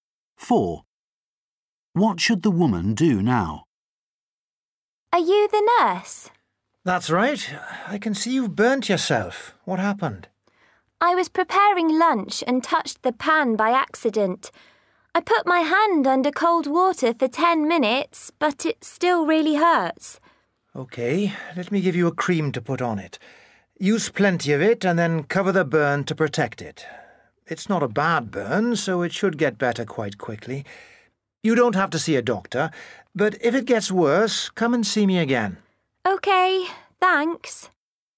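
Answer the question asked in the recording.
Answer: Put cream on the burn and cover it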